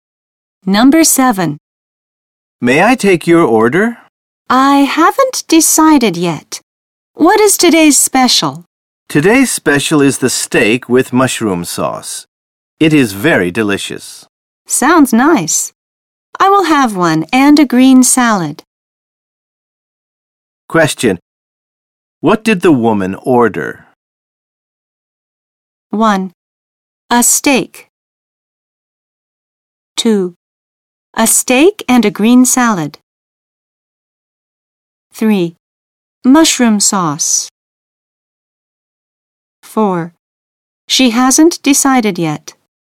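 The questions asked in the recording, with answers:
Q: What did the woman order?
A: 2: A steak and a green salad.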